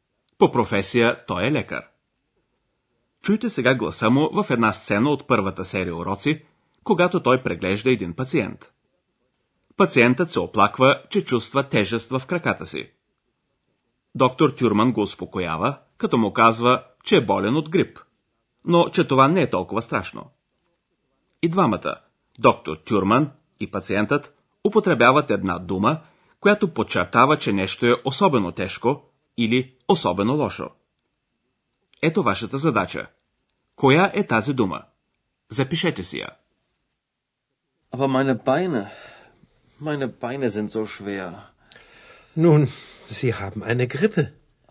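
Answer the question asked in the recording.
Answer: so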